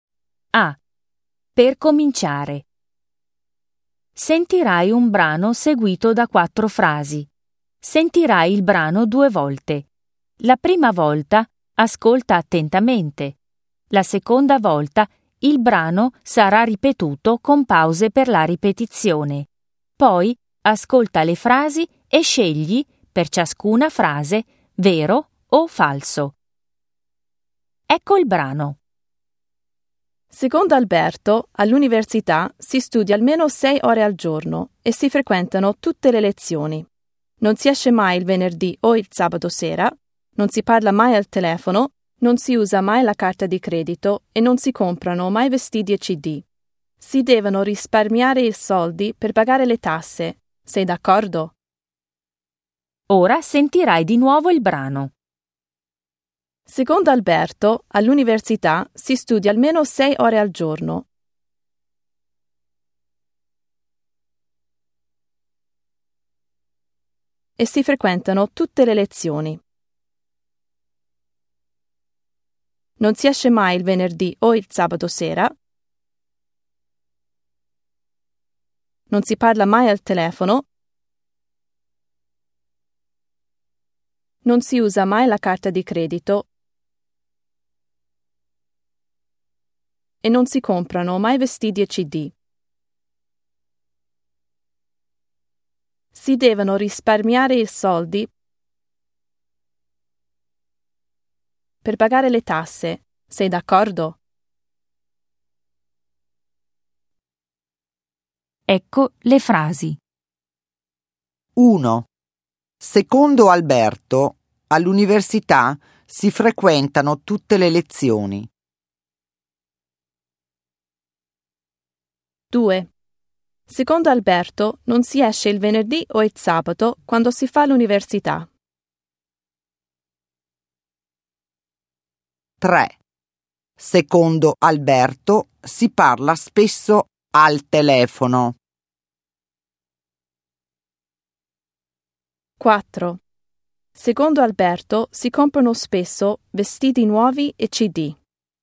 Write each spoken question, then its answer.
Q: Secondo Alberto, all'università si frequentano tutte le lezioni.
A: 1. Vero.

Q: Secondo Alberto, non si esce il venerdì o il sabato quando si fa l'università.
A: 2. Vero.

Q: Secondo Alberto, si parla spesso al telefono.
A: 3. Falso.

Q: Secondo Alberto, si comprano spesso vestiti nuovi e CD.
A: 4. Falso.